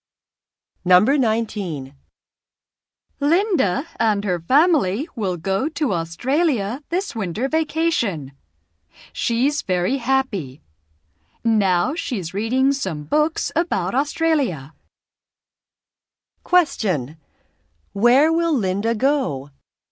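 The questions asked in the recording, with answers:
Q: Where will Linda go?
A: To Australia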